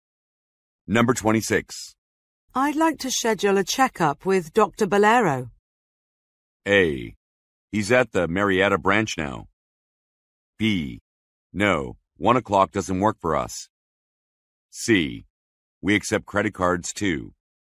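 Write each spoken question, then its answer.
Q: I'd like to schedule a checkup with Dr. Bolero.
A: A: He's at the Marietta branch now.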